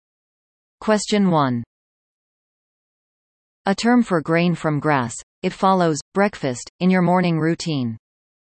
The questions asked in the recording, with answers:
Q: A term for grain from grass, it follows breakfast in your morning routine.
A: The answer is cereal.